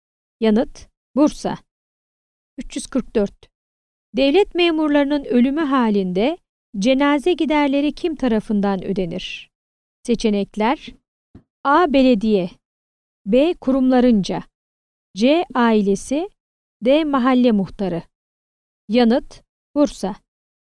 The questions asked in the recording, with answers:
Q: Devlet memurlarının ölümü halinde cenaze giderleri kim tarafından ödenir?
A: Yanıt: Bursa.